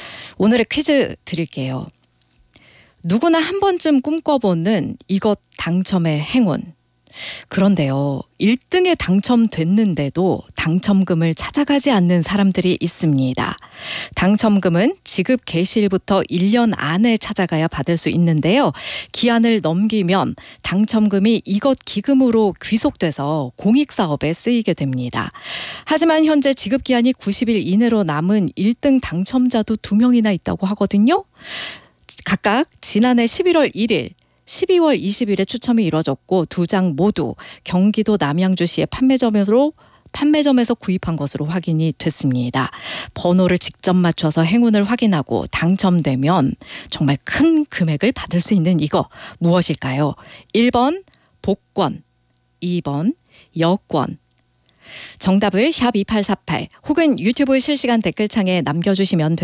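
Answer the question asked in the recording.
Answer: 1: 복권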